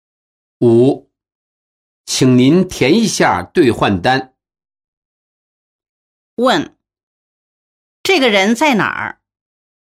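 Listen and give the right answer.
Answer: 银行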